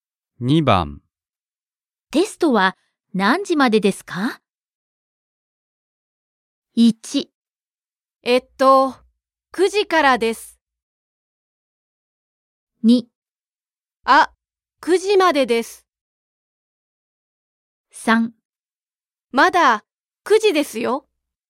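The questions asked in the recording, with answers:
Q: テストは何時までですか?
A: 2: あ、9時までです。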